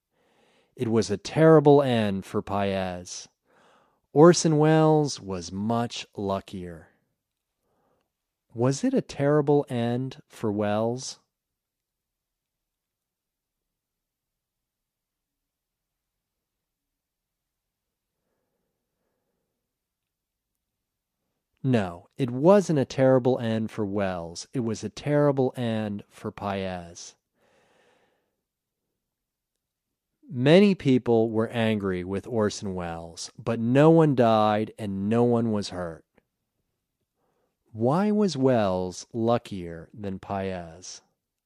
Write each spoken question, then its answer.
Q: Was it a terrible end for Welles?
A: No, it wasn't a terrible end for Welles.

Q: Why was Welles luckier than Paez?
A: Welles was luckier than Paez because no one died and no one was hurt.